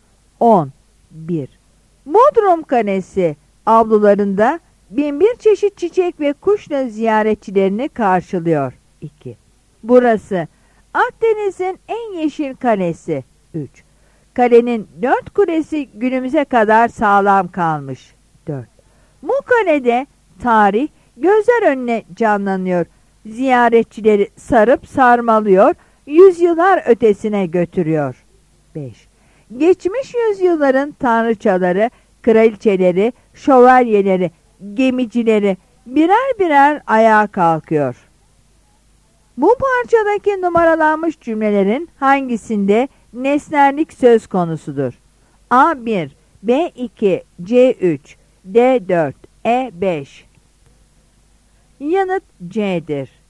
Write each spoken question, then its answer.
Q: Bu parçadaki numaralanmış cümlelerin hangisinde nesnellik söz konusudur?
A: Yanıt C'dir.